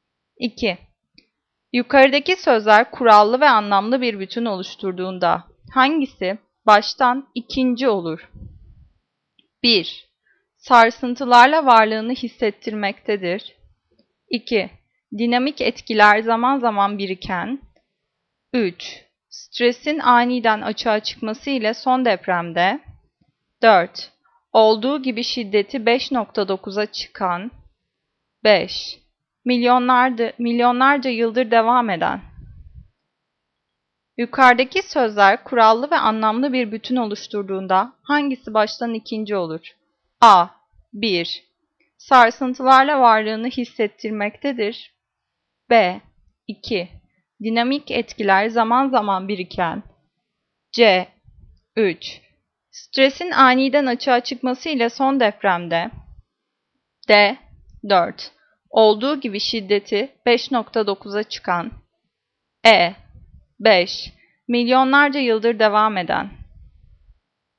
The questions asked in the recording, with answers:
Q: Yukarıdaki sözler kurallı ve anlamlı bir bütün oluşturduğunda hangisi baştan ikinci olur?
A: Cevap. B. 2. Dinamik etkiler zaman zaman biriken.